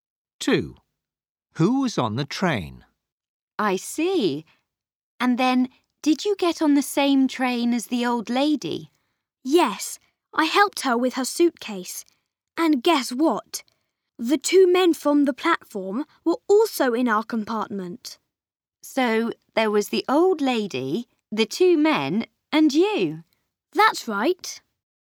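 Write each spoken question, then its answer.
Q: Who was on the train?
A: The old lady, the two men and Max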